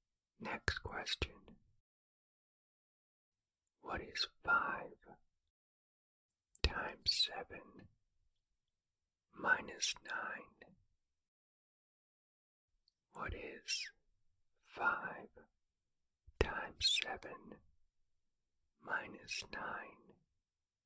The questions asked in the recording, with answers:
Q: What is 5 times 7 minus 9?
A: The answer is 26.